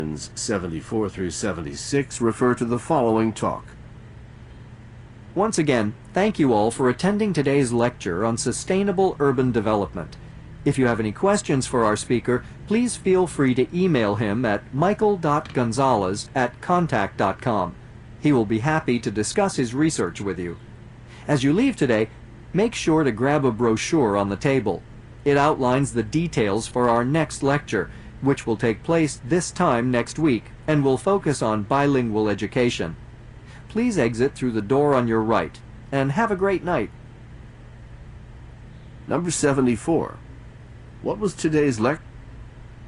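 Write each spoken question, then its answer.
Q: What was today's lecture?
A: Sustainable urban development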